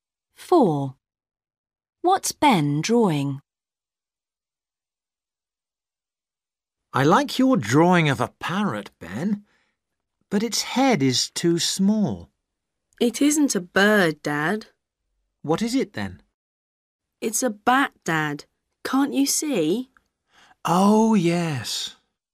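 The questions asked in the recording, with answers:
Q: What's Ben drawing?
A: a bat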